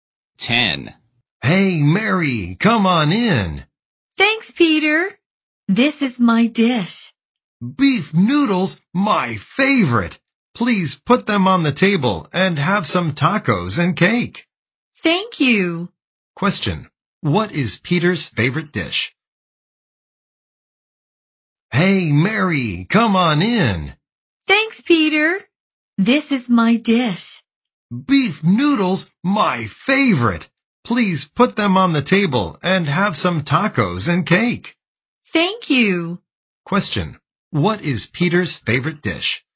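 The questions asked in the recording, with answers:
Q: Question, what is Peter's favorite dish?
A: Beef noodles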